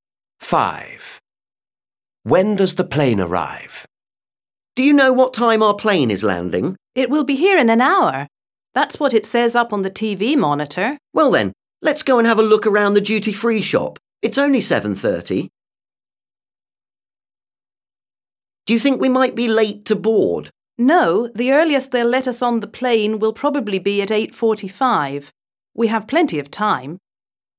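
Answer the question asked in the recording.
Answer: At 8:30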